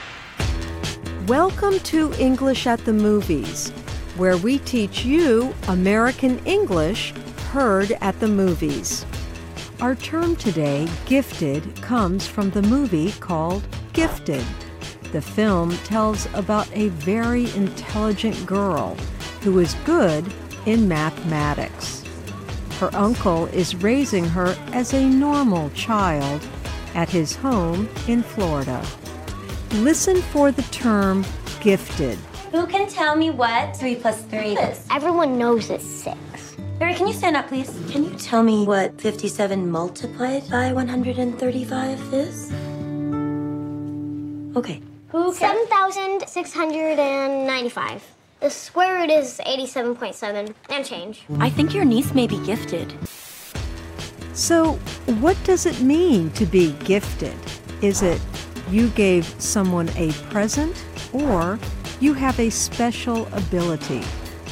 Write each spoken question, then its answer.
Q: So, what does it mean to be gifted? Is it you gave someone a present or you have a special ability.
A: Gifted means you have a special ability.